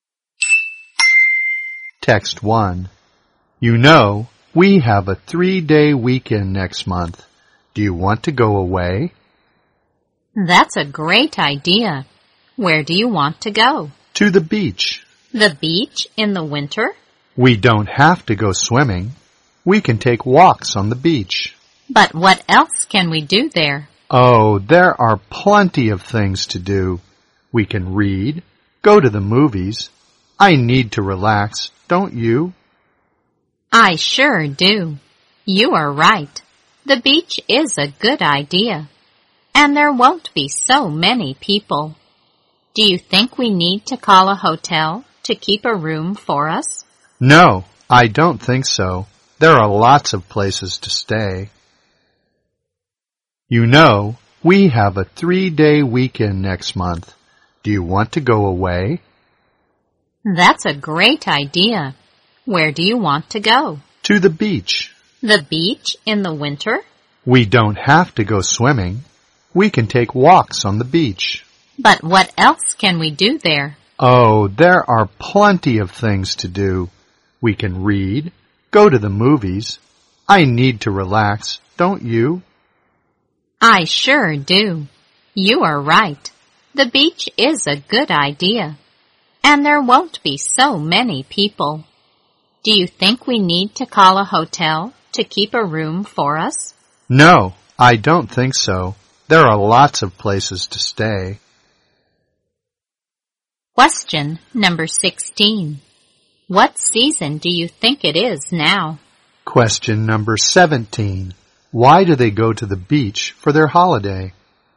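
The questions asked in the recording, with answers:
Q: What season do you think it is now?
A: Winter

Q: Why do they go to the beach for their holiday?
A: To relax; there won't be so many people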